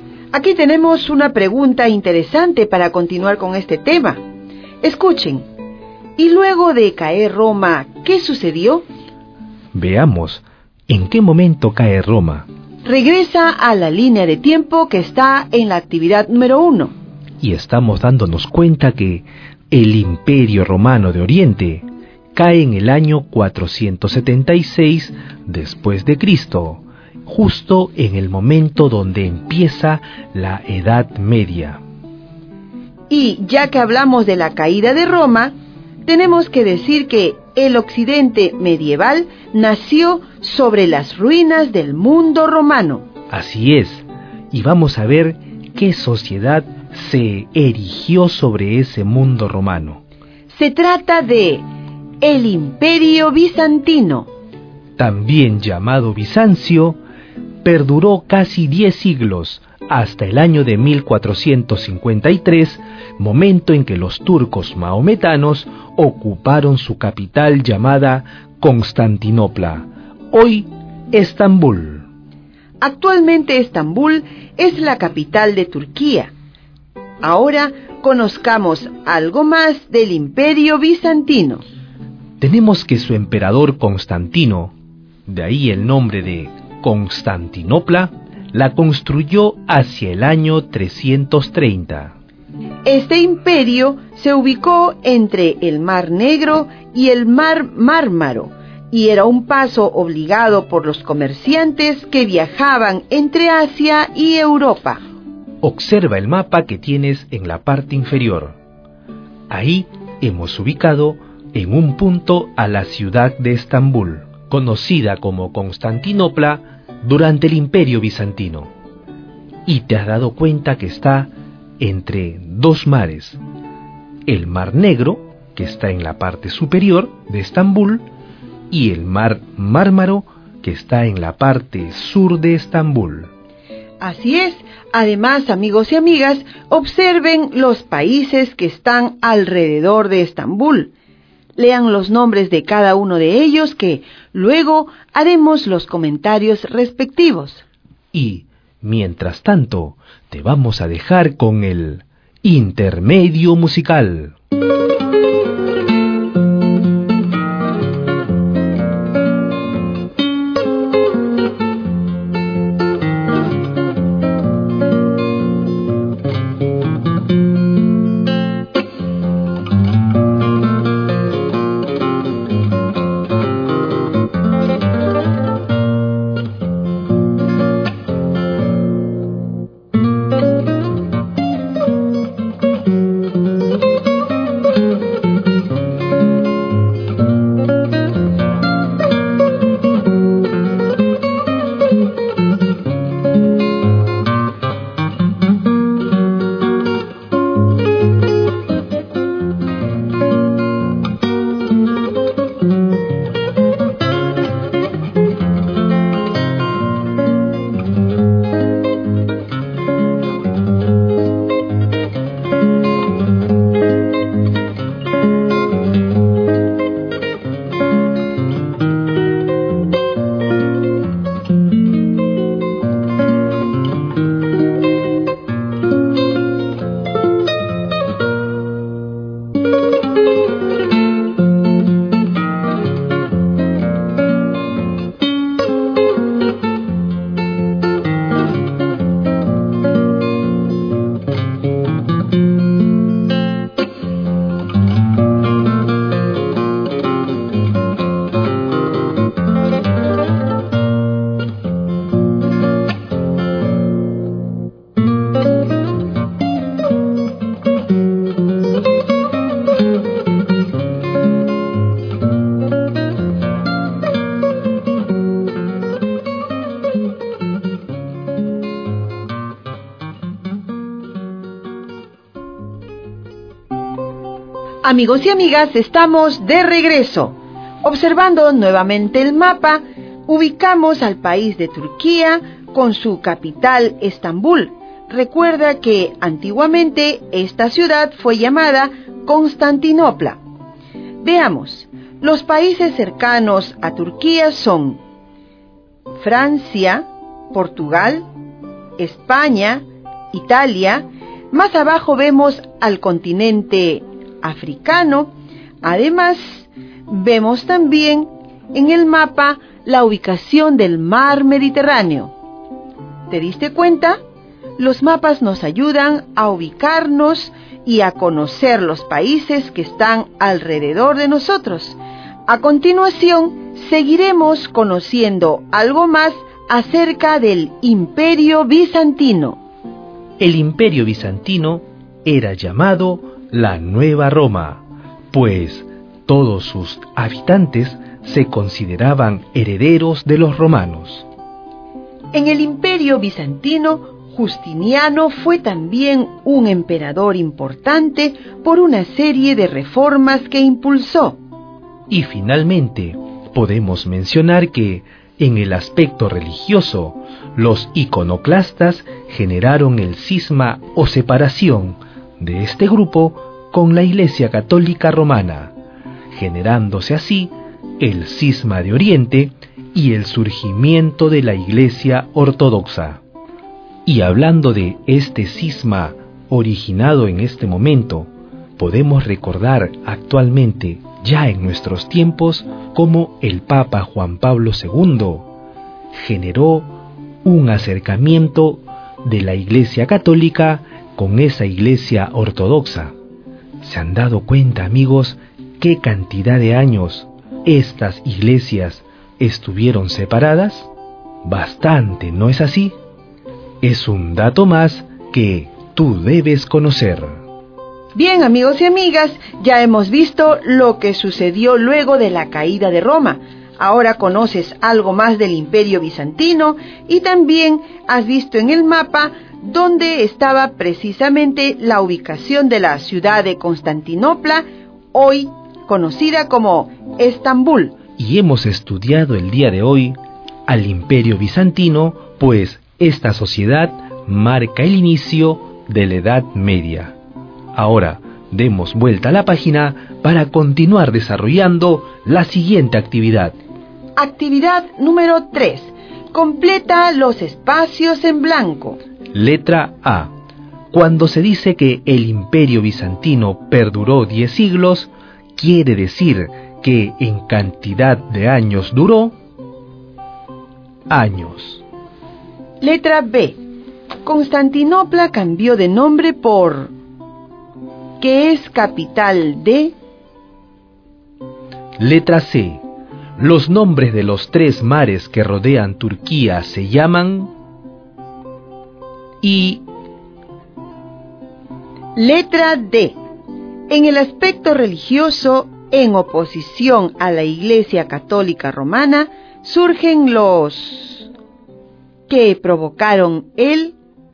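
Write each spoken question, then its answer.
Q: Cuando se dice que el Imperio Bizantino perduró 10 siglos, quiere decir que en cantidad de años duró... años.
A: 1000 años

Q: Constantinopla cambió de nombre por... que es capital de...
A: Estambul; Turquía

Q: En el aspecto religioso, en oposición a la Iglesia Católica Romana, surgen los... que provocaron el...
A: iconoclastas; cisma de Oriente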